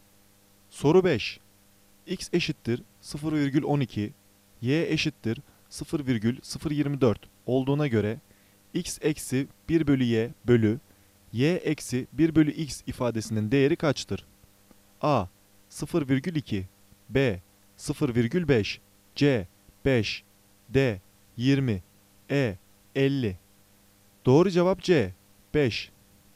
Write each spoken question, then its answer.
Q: X eşittir 0,12, Y eşittir 0,024 olduğuna göre X eksi 1 bölü Y bölü Y eksi 1 bölü X ifadesinin değeri kaçtır?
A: Doğru cevap C. 5